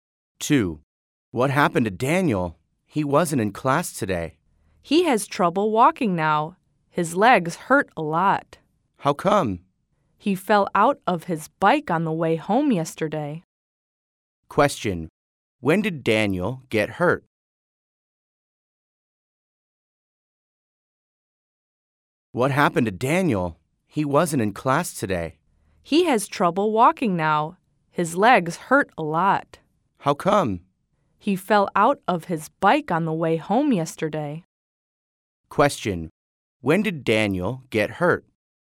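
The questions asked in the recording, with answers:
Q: When did Daniel get hurt?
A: Yesterday, on the way home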